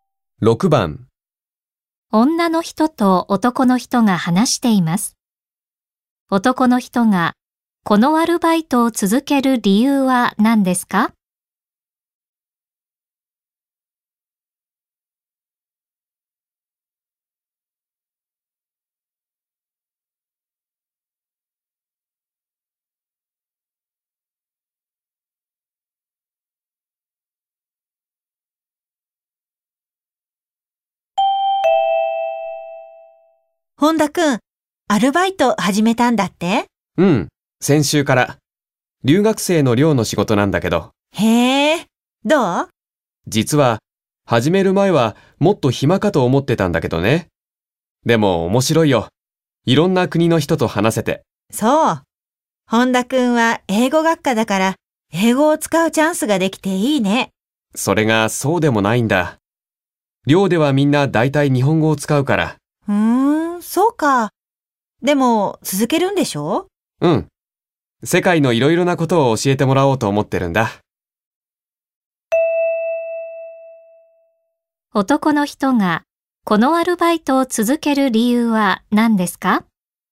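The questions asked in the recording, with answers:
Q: 男の人がこのアルバイトを続ける理由は何ですか?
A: 世界のいろいろなことを教えてもらいたいから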